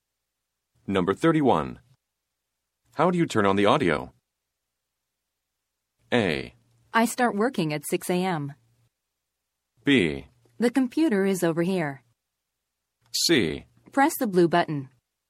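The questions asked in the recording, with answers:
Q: How do you turn on the audio?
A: C: Press the blue button.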